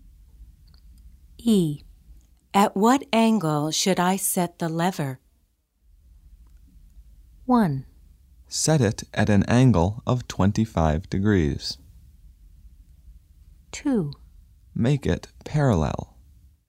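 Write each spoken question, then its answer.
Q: At what angle should I set the lever?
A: 1: Set it at an angle of 25 degrees.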